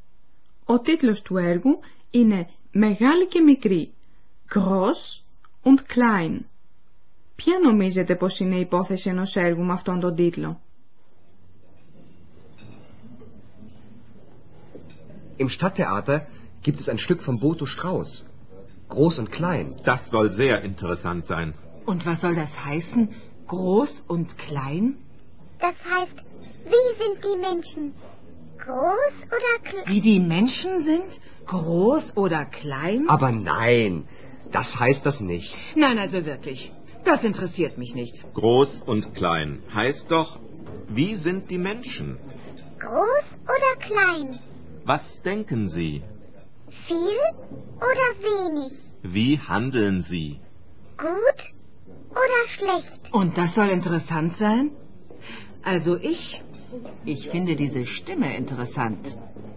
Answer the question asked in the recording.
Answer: Το «Μεγάλη και μικρή» αφορά το χαρακτήρα των ανθρώπων.